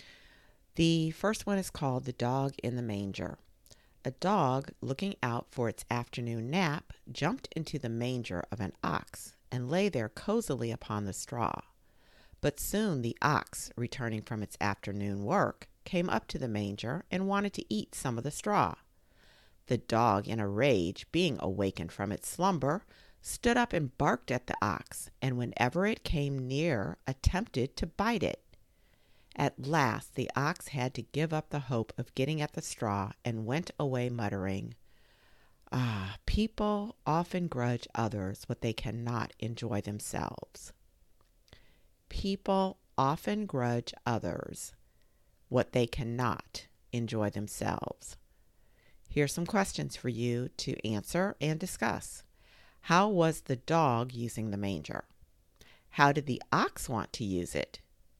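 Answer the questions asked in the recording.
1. To take its afternoon nap on the straw
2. To eat some of the straw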